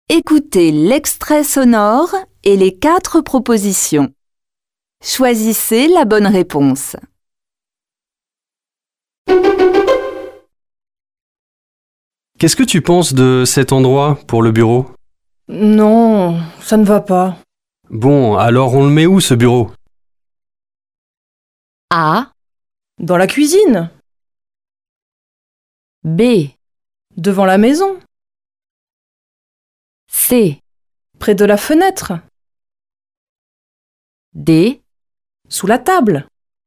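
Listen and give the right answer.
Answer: C: Près de la fenêtre.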